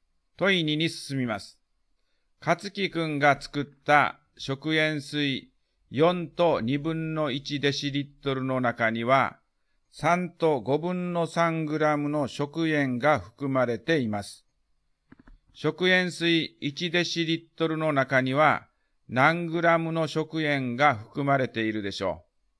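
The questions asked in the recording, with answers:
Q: 食塩水1デシリットルの中には何グラムの食塩が含まれているでしょう。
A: 5分の4グラム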